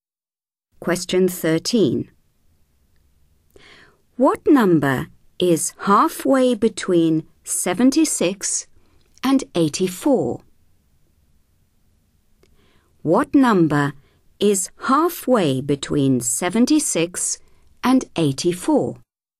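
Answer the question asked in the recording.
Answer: 80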